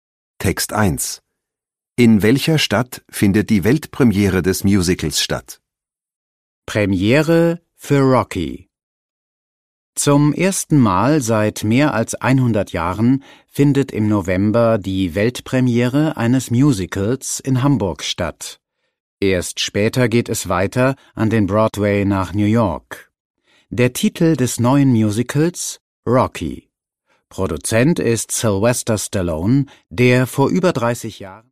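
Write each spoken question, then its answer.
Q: In welcher Stadt findet die Weltpremiere des Musicals statt?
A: In Hamburg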